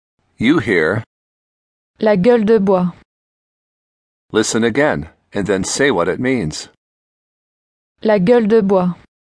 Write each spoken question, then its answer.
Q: Listen again, and then say what it means.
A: The hangover.